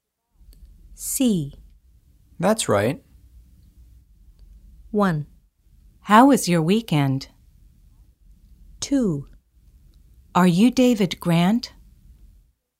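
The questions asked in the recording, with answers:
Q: That's right.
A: 2: Are you David Grant?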